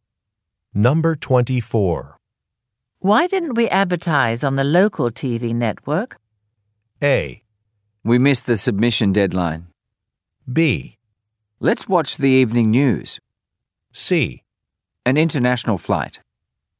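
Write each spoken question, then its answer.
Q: Why didn't we advertise on the local TV network?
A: A: We missed the submission deadline.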